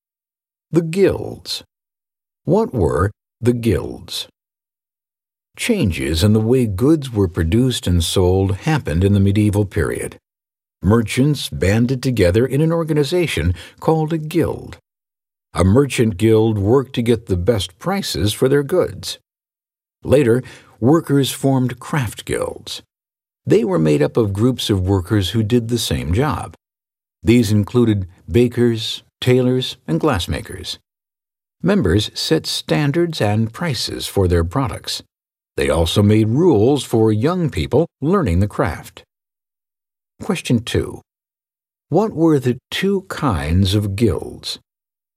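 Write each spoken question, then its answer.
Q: What were the two kinds of guilds?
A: Merchant guilds and craft guilds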